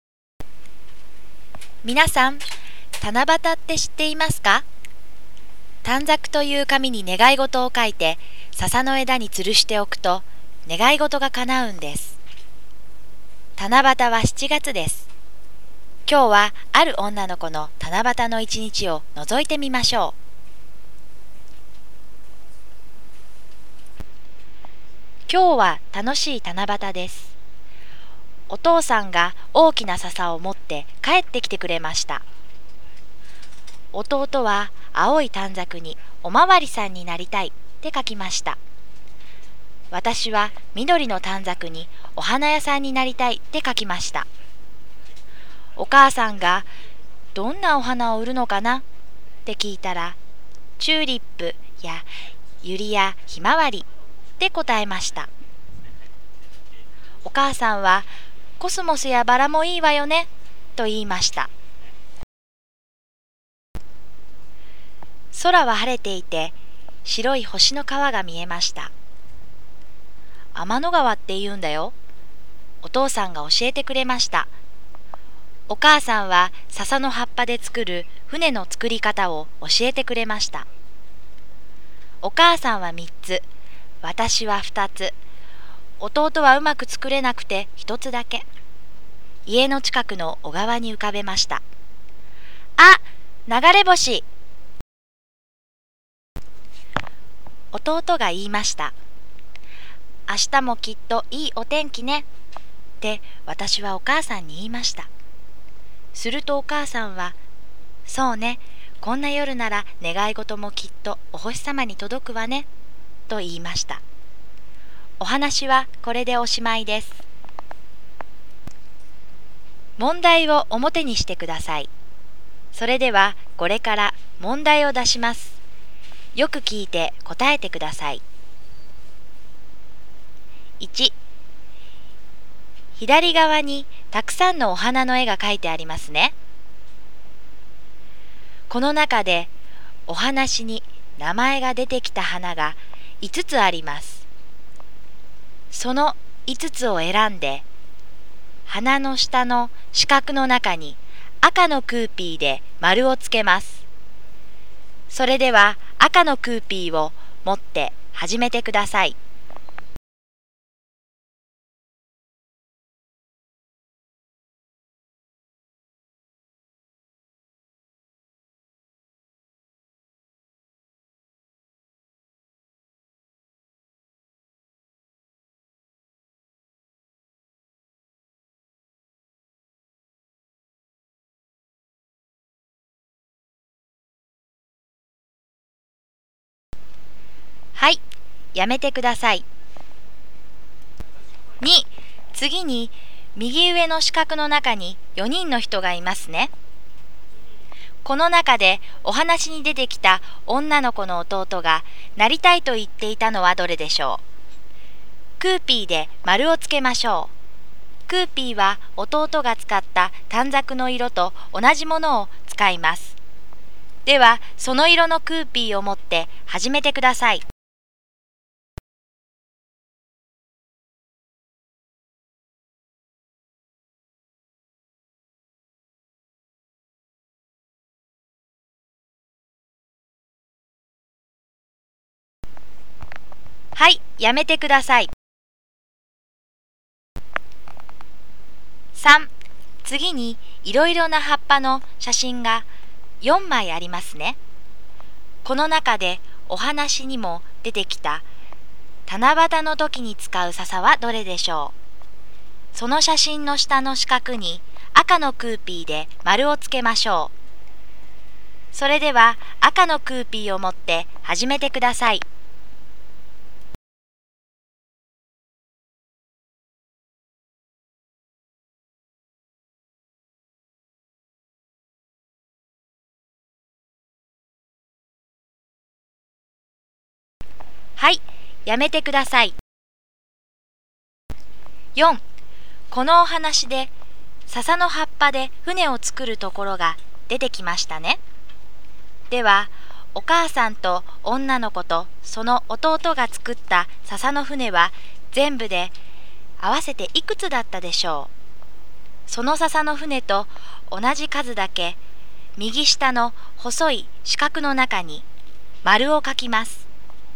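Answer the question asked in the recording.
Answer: 6つ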